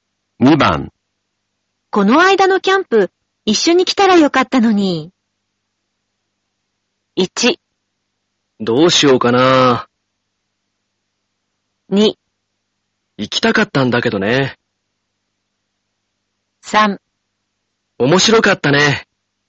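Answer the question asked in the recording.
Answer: 2: 行きたかったんだけどね。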